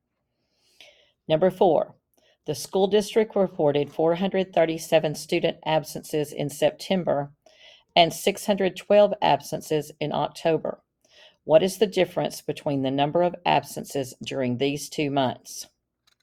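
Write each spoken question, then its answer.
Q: What is the difference between the number of absences during these 2 months?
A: 175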